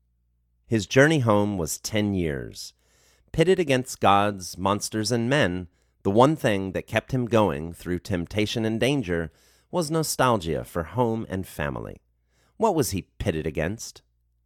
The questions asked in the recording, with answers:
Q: What was he pitted against?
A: He was pitted against gods, monsters, and men.